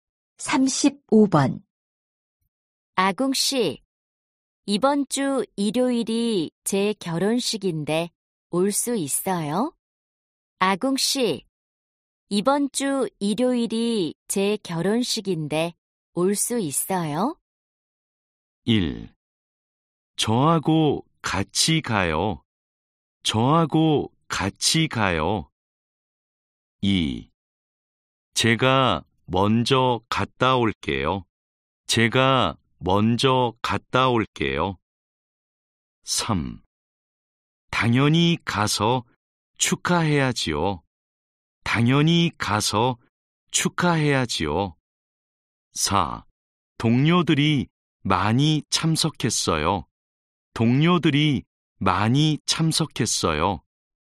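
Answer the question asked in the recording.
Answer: 3: 당연히 가서 축하해야지요.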